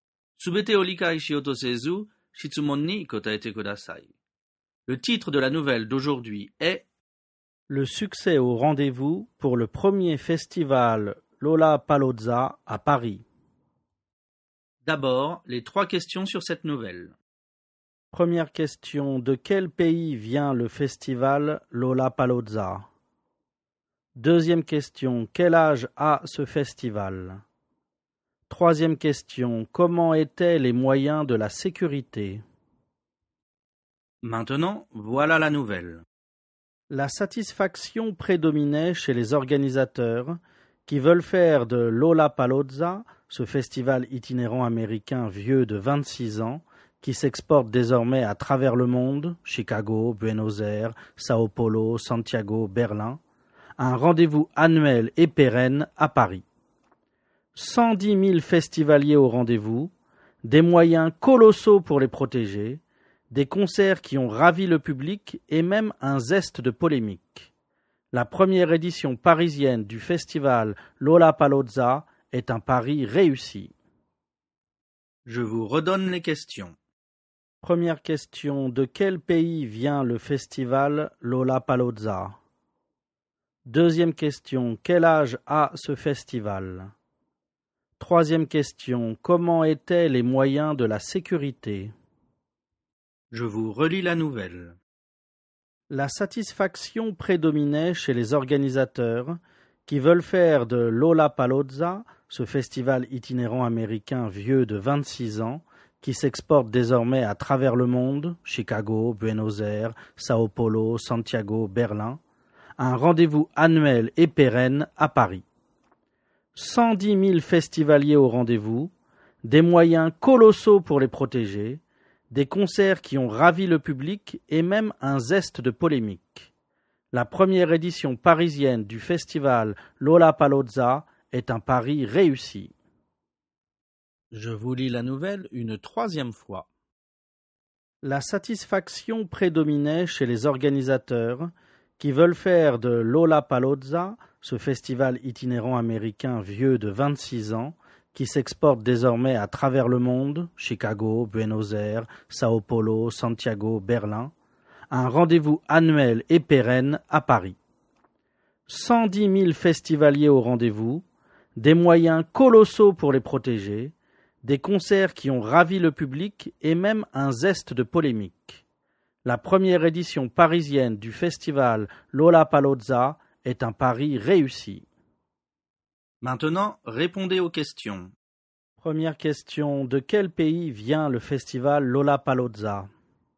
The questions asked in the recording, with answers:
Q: Première question, de quel pays vient le festival Lollapalooza?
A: Réponse, ce festival vient des États-Unis.

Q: Deuxième question, quel âge a ce festival?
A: Réponse, ce festival a 26 ans.

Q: Troisième question, comment étaient les moyens de la sécurité?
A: Réponse, les moyens de la sécurité étaient colossaux.